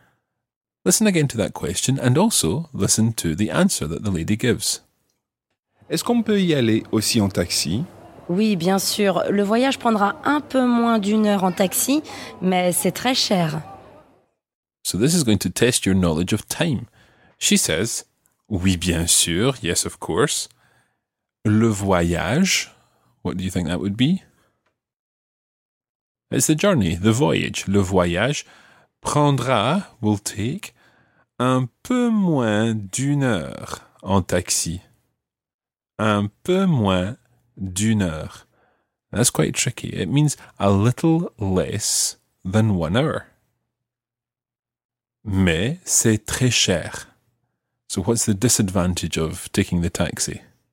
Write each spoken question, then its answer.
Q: So what's the disadvantage of taking the taxi?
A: C'est très cher. It's very expensive.